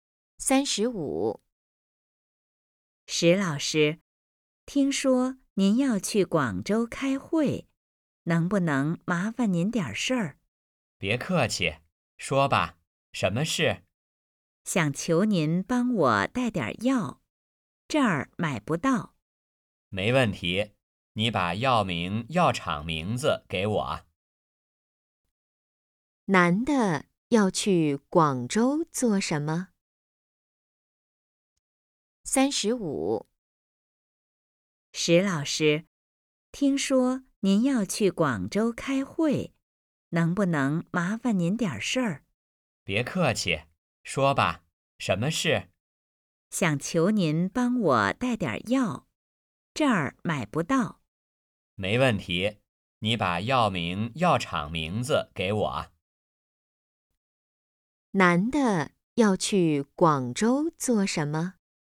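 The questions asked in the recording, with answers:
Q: 男的要去广州做什么?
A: 开会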